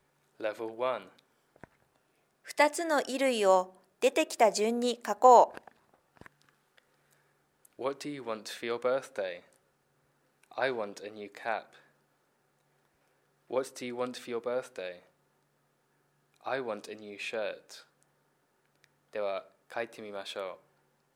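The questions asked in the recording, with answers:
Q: 2つの衣類を出てきた順に書こう。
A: cap, shirt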